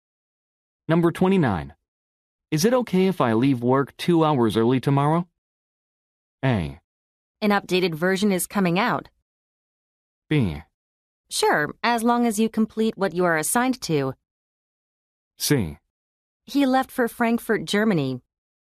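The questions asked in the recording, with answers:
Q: Is it okay if I leave work 2 hours early tomorrow?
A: B: Sure, as long as you complete what you are assigned to.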